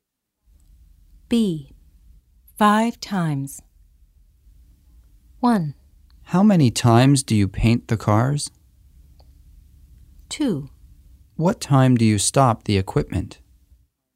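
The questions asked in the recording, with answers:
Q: 5 times.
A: 1: How many times do you paint the cars?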